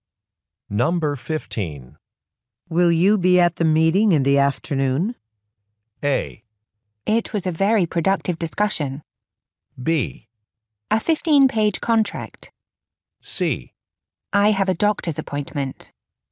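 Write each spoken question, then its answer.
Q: Will you be at the meeting in the afternoon?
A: C: I have a doctor's appointment.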